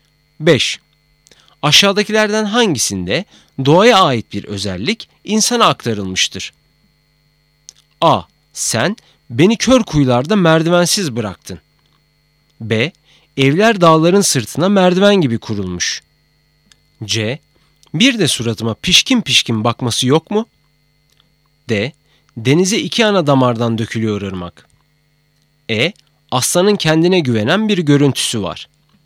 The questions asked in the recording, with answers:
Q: Aşağıdakilerden hangisinde doğaya ait bir özellik insana aktarılmıştır?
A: Doğru cevap C. Bir de suratıma pişkin pişkin bakması yok mu?